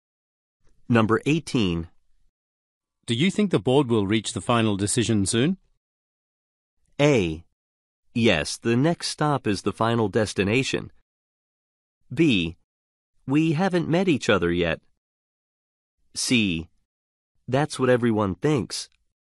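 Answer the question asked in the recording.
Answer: C: That's what everyone thinks.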